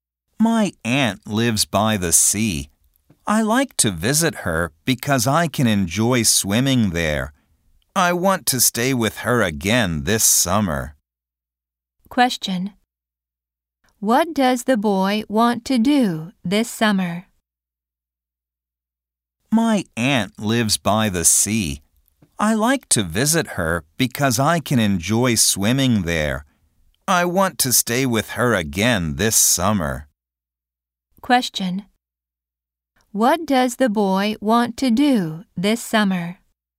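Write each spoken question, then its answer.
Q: What does the boy want to do this summer?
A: Stay with his aunt by the sea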